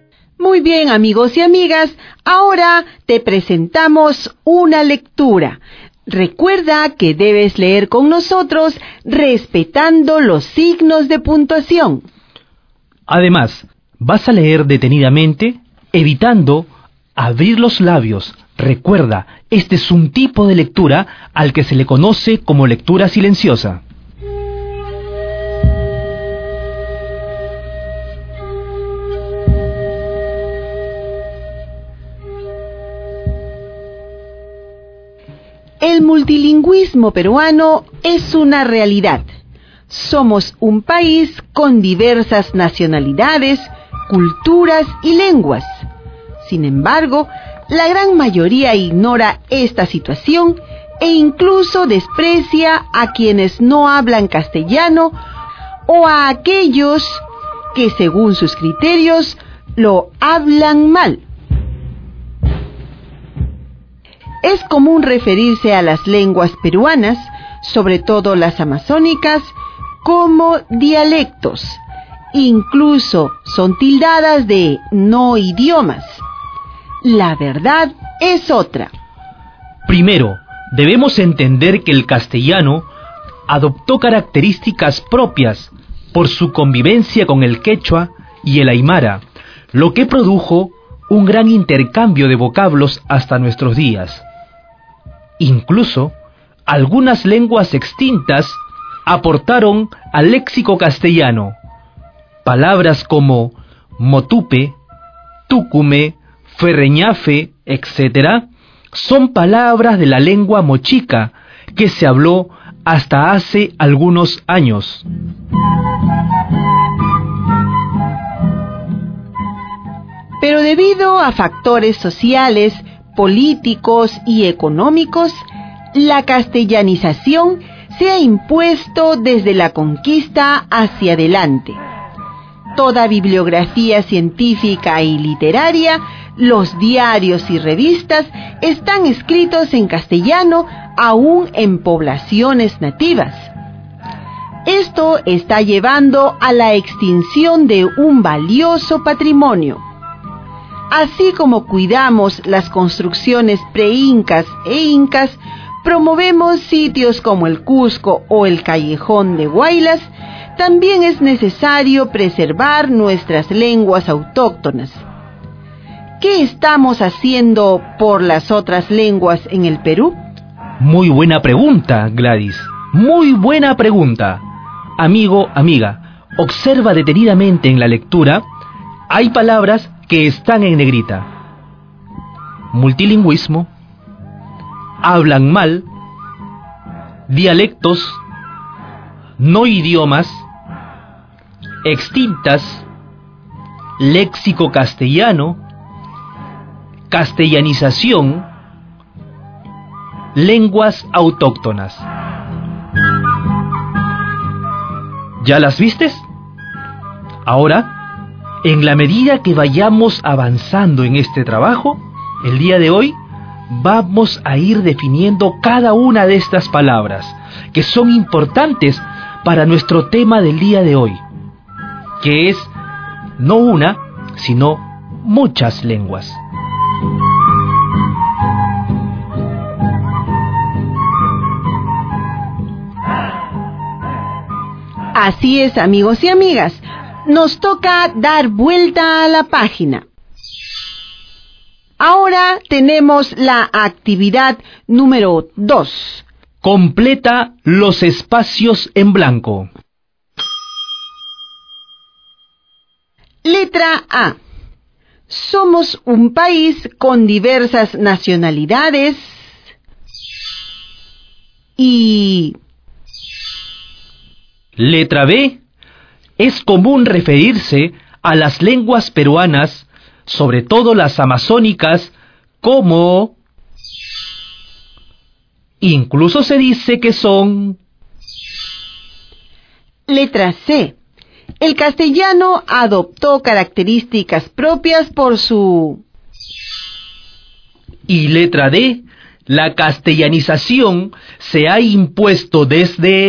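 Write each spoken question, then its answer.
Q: Somos un país con diversas nacionalidades y...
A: culturas y lenguas

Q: Es común referirse a las lenguas peruanas, sobre todo las amazónicas, como...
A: dialectos

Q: Incluso se dice que son...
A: no idiomas

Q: El castellano adoptó características propias por su...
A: convivencia con el quechua y el aymara

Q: La castellanización se ha impuesto desde...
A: la conquista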